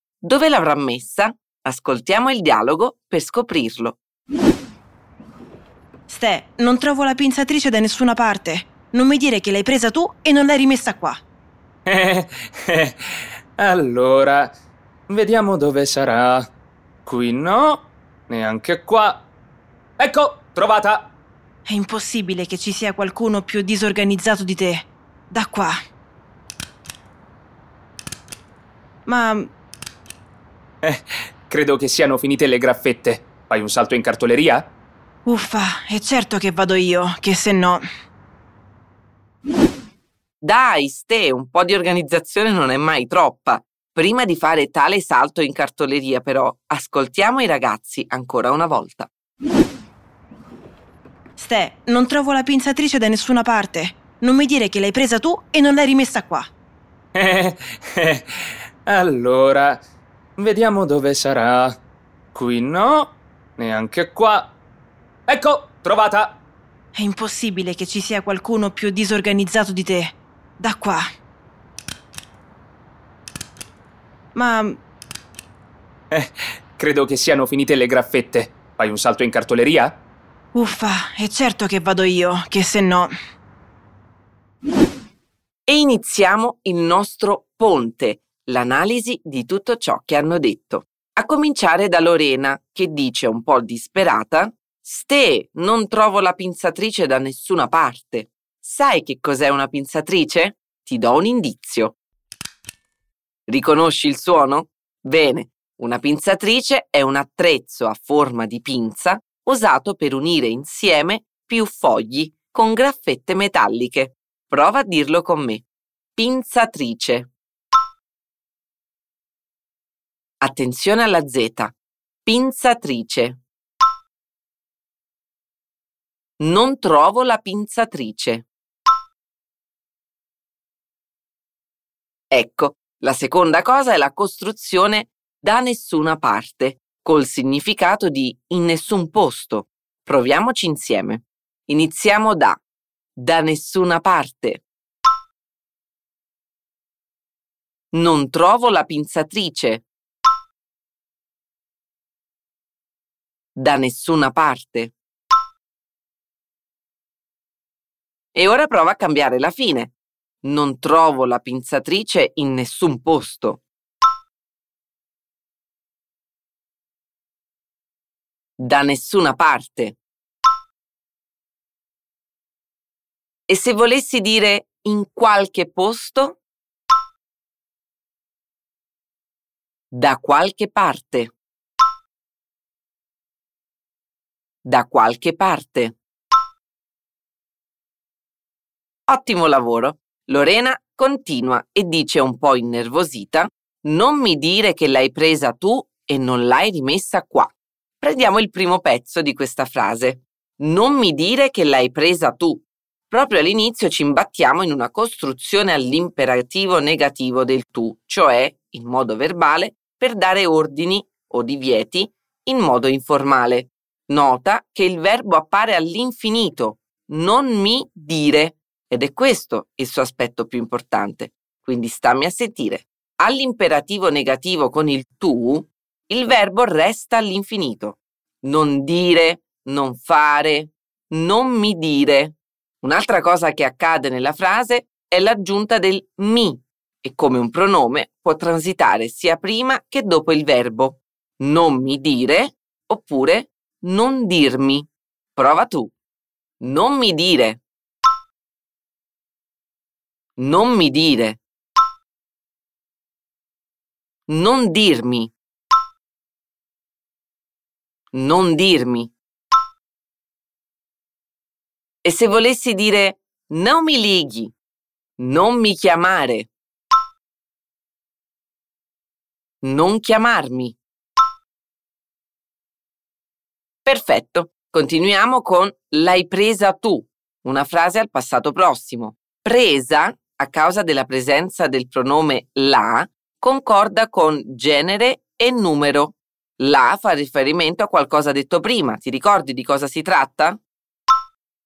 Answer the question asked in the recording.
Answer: Sì, la pinzatrice, che è una parola femminile.